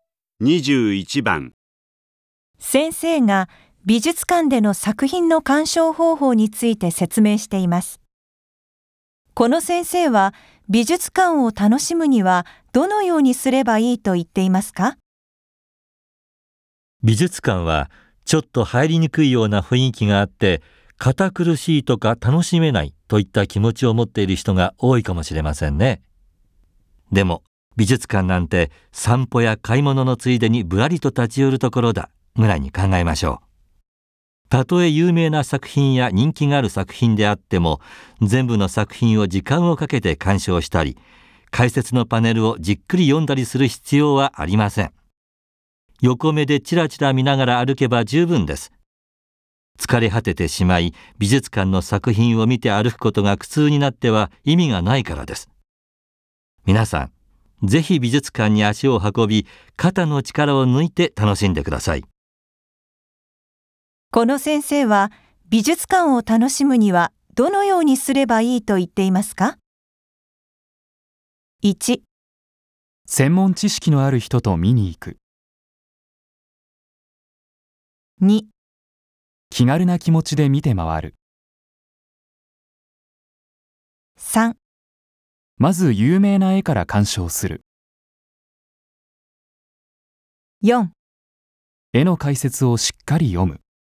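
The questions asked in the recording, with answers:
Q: この先生は、美術館を楽しむには、どのようにすればいいと言っていますか?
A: 2: 気軽な気持ちで見て回る。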